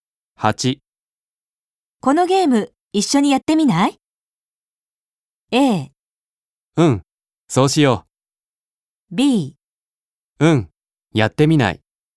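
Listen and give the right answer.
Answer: A: うん、そうしよう。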